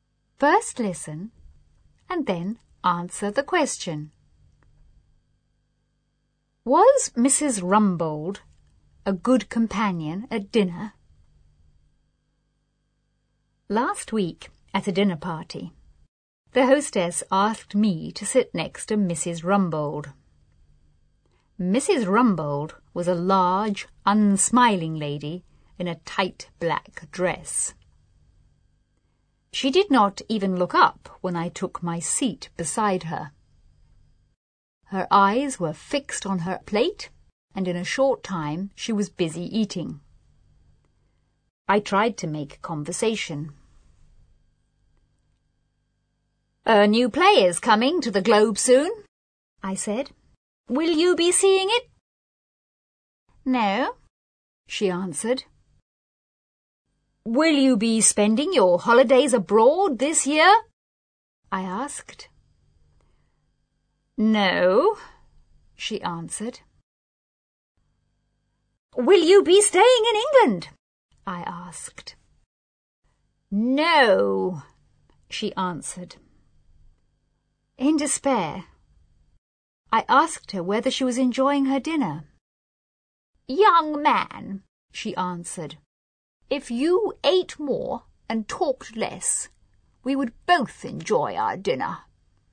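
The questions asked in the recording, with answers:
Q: Was Mrs. Rumbold a good companion at dinner?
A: No, she barely talked and only wanted to eat.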